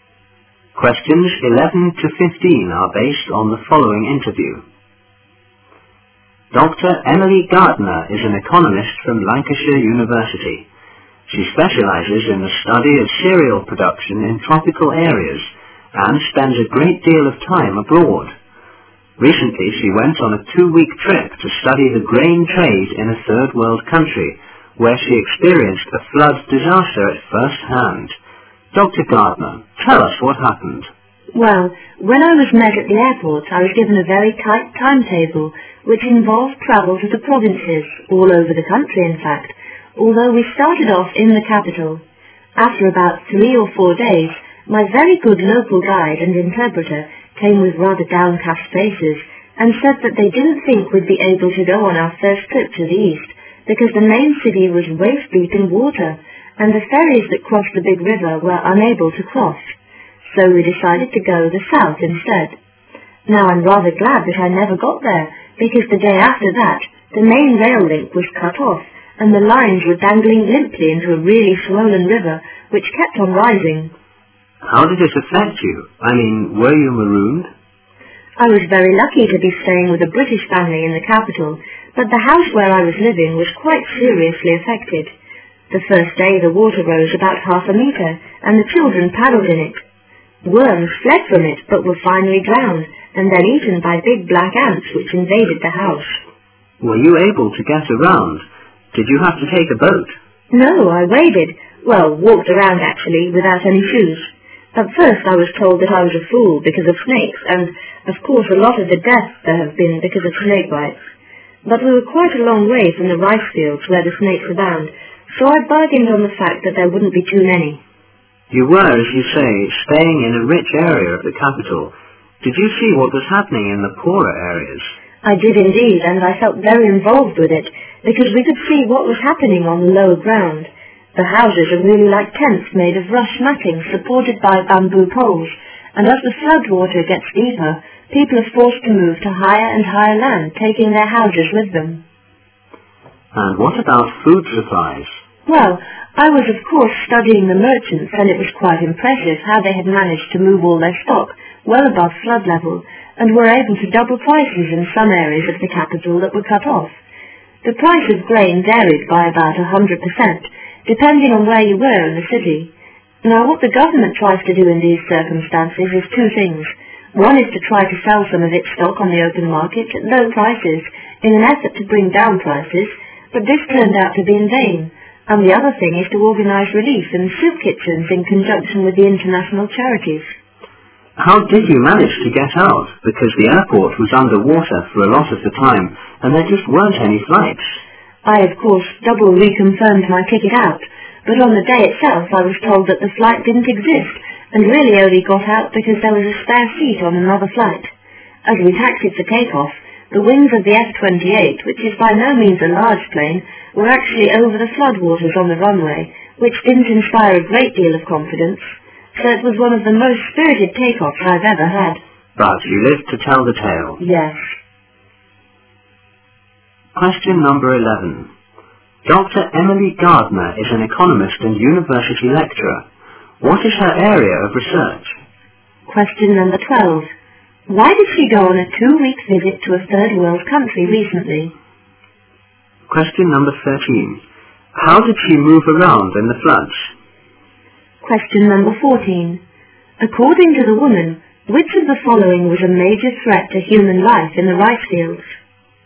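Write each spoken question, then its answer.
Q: Dr. Emily Gardner is an economist and university lecturer. What is her area of research?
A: Cereal production in tropical areas

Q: Why did she go on a 2-week visit to a third world country recently?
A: To study the grain trade

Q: How did she move around in the floods?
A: She waded, walking around without shoes

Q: According to the woman, which of the following was a major threat to human life in the rice fields?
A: Snake bites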